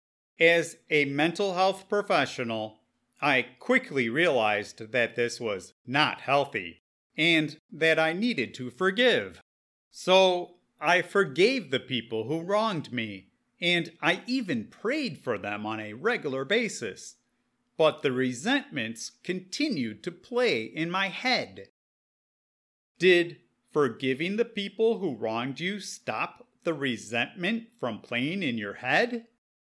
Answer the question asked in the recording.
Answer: No. Unfortunately, no matter how many times I prayed for the people who wronged me, the resentments kept haunting me.